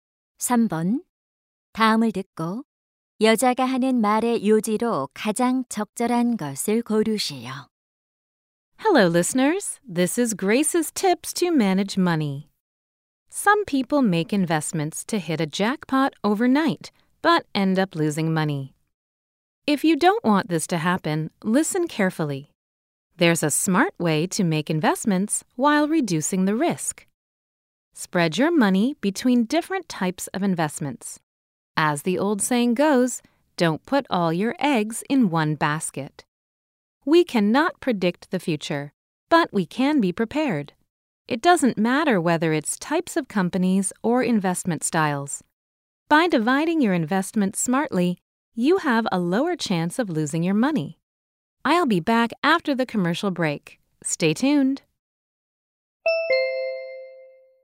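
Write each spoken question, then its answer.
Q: 다음을 듣고 여자가 하는 말의 요지로 가장 적절한 것을 고르시오.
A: 위험을 줄이려면 여러 종류에 분산 투자해야 한다.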